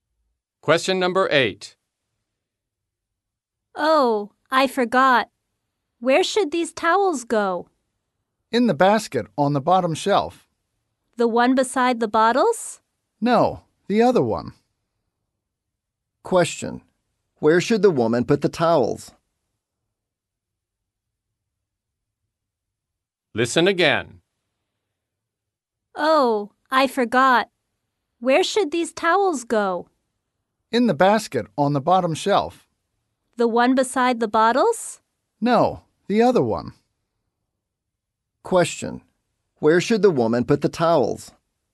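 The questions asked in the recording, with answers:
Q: Where should the woman put the towels?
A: In the basket on the bottom shelf, not the one beside the bottles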